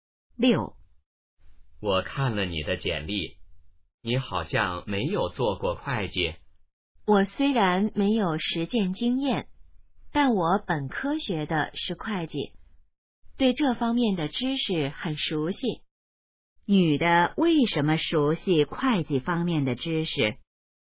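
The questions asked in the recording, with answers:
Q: 女的为什么熟悉会计方面的知识?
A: 本科学的是会计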